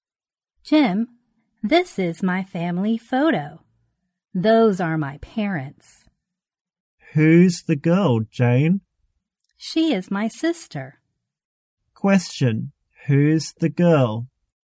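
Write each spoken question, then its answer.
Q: Who's the girl?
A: Jane's sister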